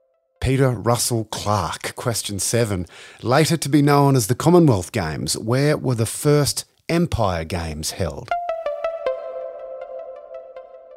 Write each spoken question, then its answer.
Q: Later to be known as the Commonwealth Games, where were the first Empire Games held?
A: In Canada, in 1930, in Hamilton.